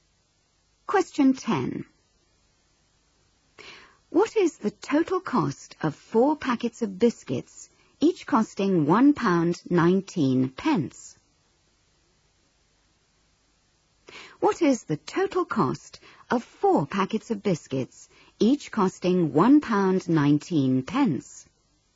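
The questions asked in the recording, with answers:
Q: What is the total cost of 4 packets of biscuits, each costing £1.19?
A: £4.76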